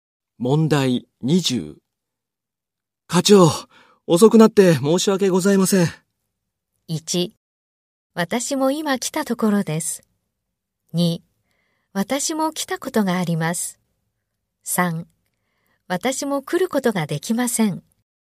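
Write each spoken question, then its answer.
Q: 課長、遅くなって申し訳ございません。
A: 2: 私も今来たところです。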